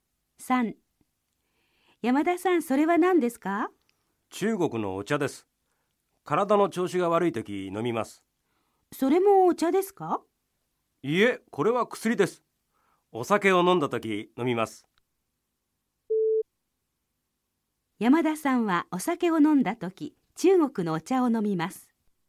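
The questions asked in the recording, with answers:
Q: 山田さんはお酒を飲んだとき、中国のお茶を飲みます。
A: ×(まちがい):お酒を飲んだときは薬を飲みます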